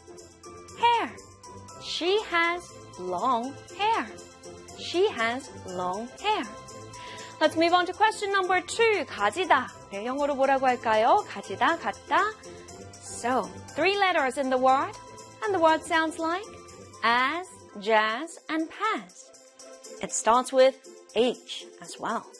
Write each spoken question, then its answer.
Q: 가지다. 영어로 뭐라고 할까요?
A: 가지다 in English is, of course, H-A-S, has.